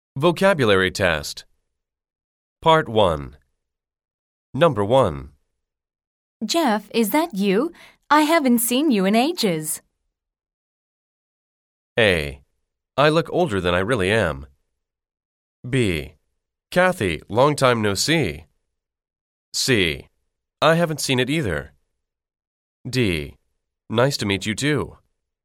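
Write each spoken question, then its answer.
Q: Jeff, is that you? I haven't seen you in ages.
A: B: Kathy, long time no see.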